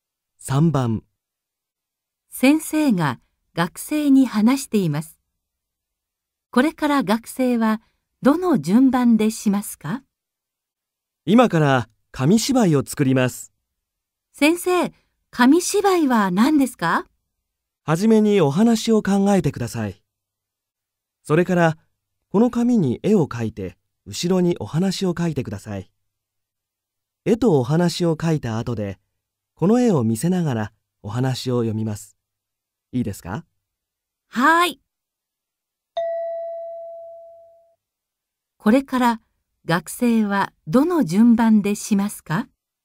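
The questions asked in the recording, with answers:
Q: これから学生はどの順番でしますか?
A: お話を考える→紙に絵を描く→後ろにお話を書く→絵を見せながらお話を読む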